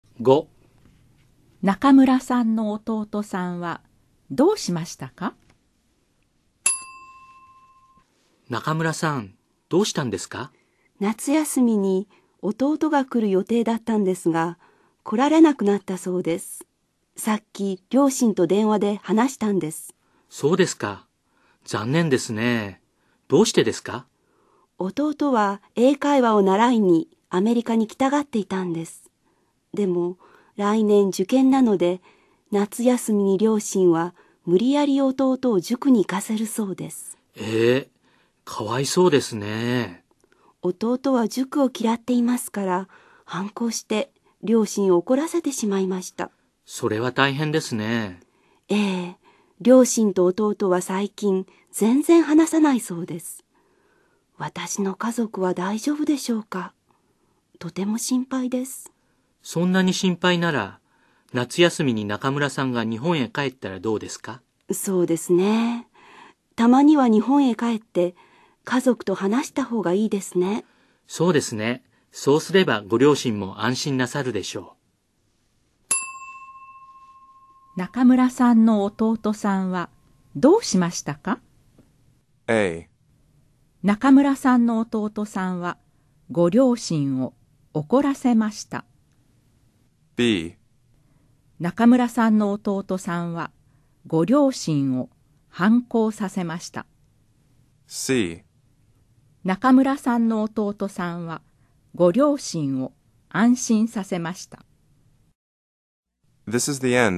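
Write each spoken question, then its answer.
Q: 中村さんの弟さんはどうしましたか?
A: A: 中村さんの弟さんはご両親を怒らせました。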